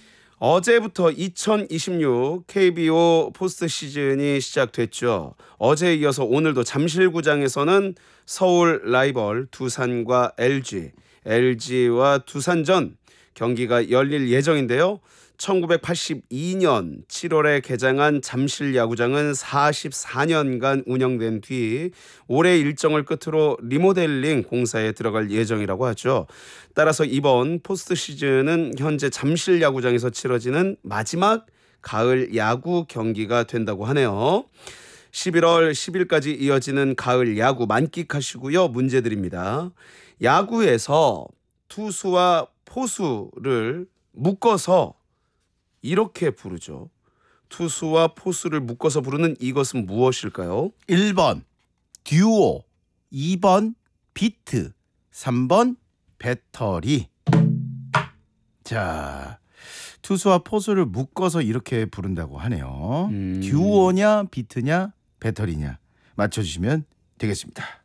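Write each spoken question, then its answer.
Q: 투수와 포수를 묶어서 부르는 이것은 무엇일까요?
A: 3: 배터리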